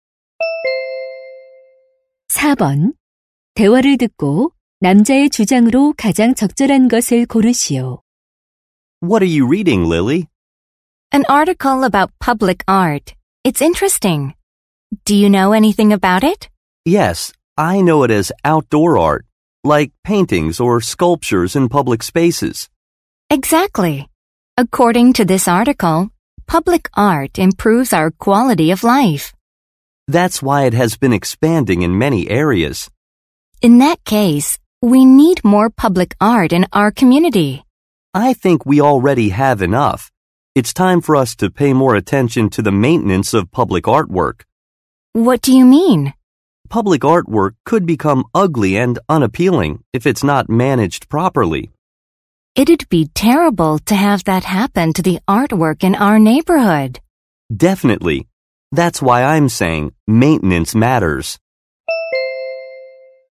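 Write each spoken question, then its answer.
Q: 대화를 듣고 남자의 주장으로 가장 적절한 것을 고르시오.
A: 공공 예술 작품의 관리(유지 보수)에 더 관심을 기울여야 한다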